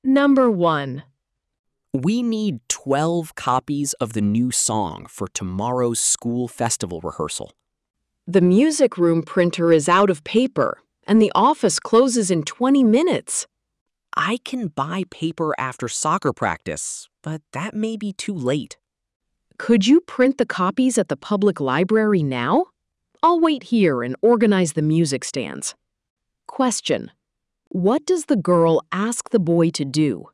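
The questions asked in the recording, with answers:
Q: What does the girl ask the boy to do?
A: Print 12 copies of the new song at the public library now.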